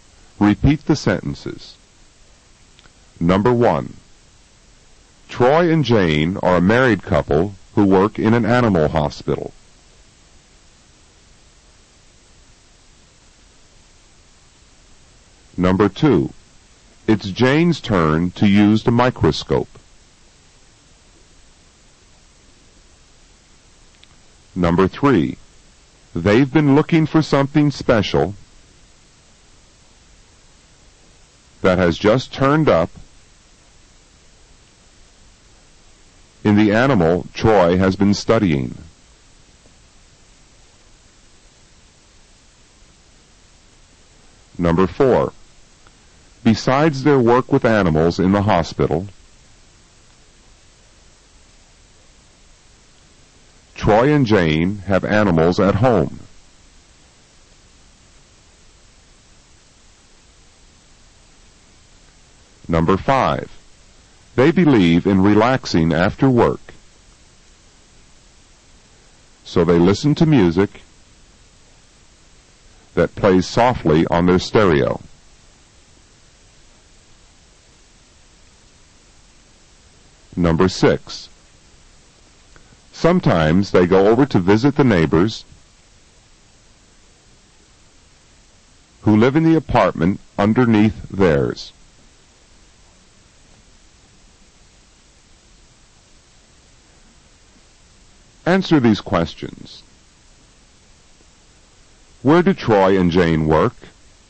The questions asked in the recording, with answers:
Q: Where do Troy and Jane work?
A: Troy and Jane work in an animal hospital.